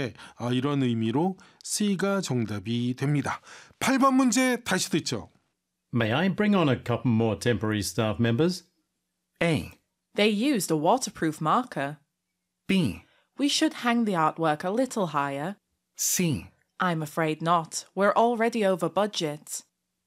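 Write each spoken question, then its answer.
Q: May I bring on a couple more temporary staff members?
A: C: I'm afraid not. We're already over budget.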